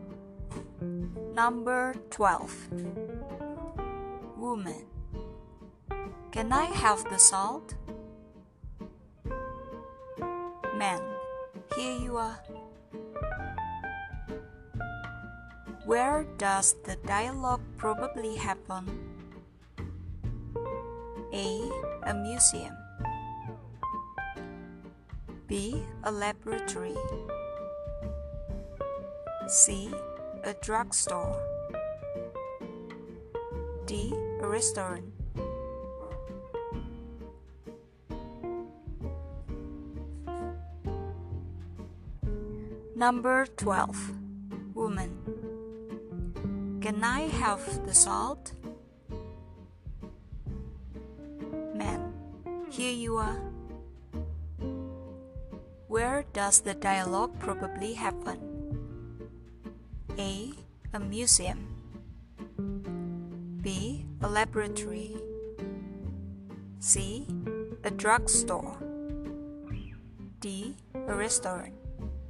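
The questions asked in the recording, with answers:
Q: Where does the dialogue probably happen?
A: D: A restaurant.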